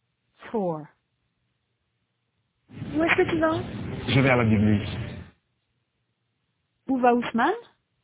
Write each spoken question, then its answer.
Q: Où va Ousmane?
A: À la bibliothèque. Il va à la bibliothèque.